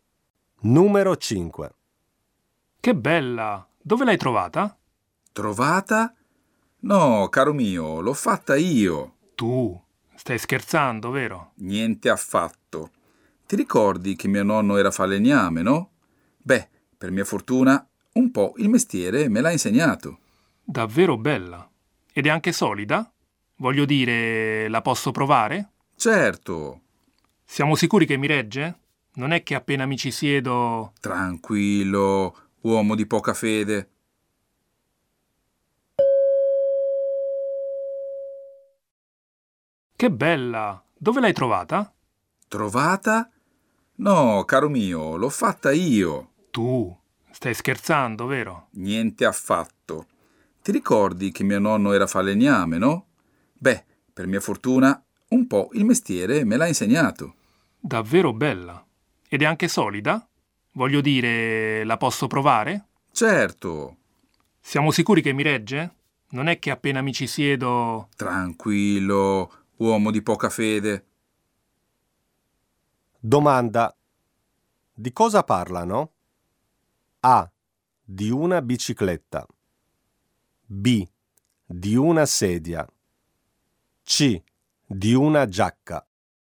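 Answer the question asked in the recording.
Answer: B: Di una sedia.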